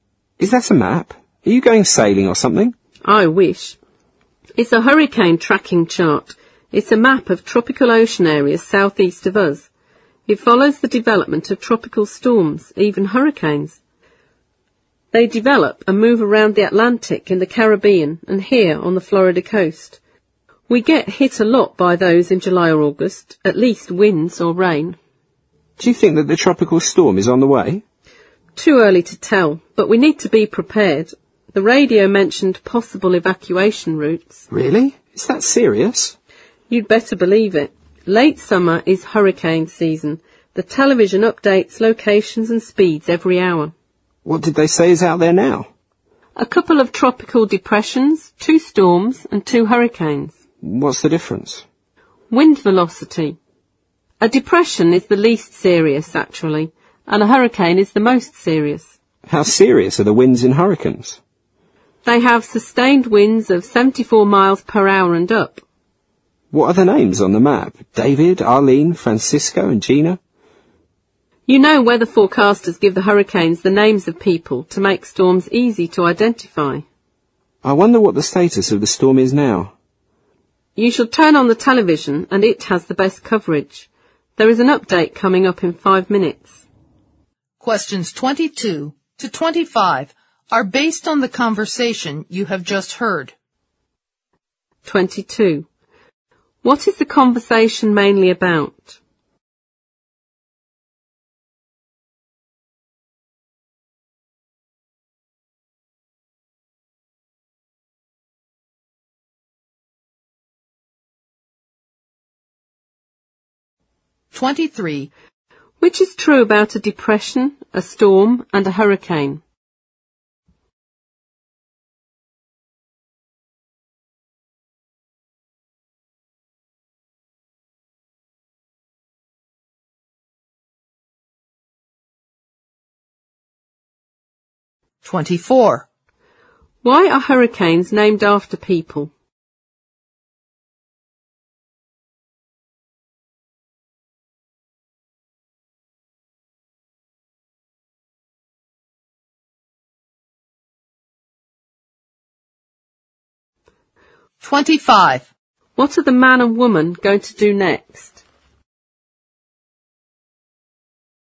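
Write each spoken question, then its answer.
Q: What is the conversation mainly about?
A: Tracking tropical storms and hurricanes

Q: Which is true about a depression, a storm, and a hurricane?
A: They differ in wind velocity; a depression is least serious and a hurricane most serious

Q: Why are hurricanes named after people?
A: To make storms easy to identify

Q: What are the man and woman going to do next?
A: Turn on the television to watch the storm update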